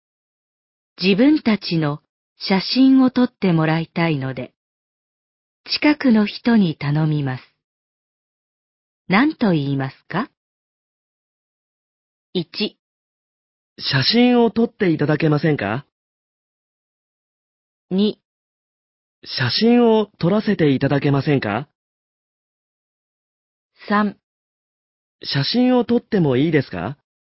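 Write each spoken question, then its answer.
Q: 何と言いますか?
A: 1: 写真を撮っていただけませんか?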